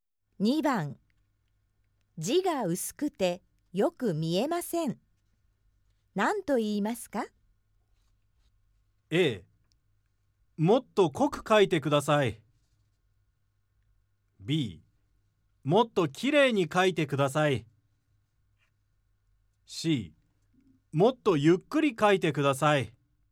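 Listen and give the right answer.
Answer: A: もっと濃く書いてください。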